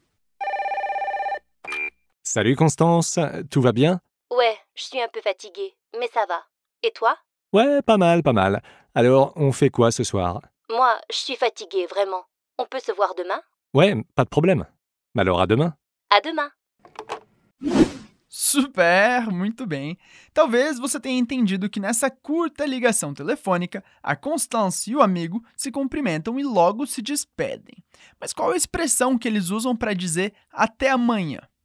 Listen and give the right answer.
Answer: À demain.